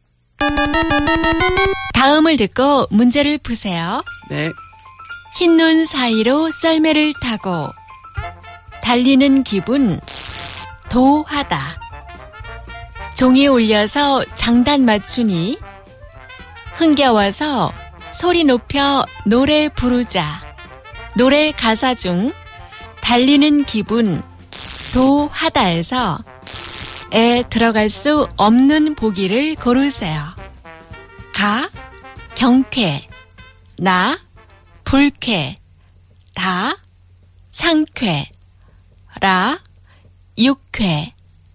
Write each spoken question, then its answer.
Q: 노래 가사 중 달리는 기분 도하다에서 에 들어갈 수 없는 보기를 고르세요.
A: The answer is 나 불쾌.